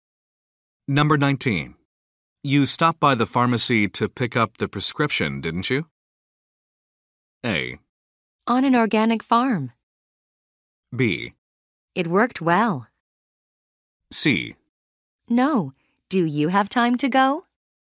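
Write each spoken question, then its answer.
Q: You stopped by the pharmacy to pick up the prescription, didn't you?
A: C: No. Do you have time to go?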